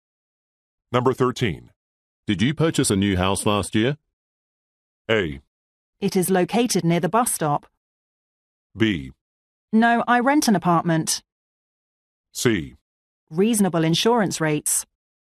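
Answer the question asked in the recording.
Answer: B: No, I rent an apartment.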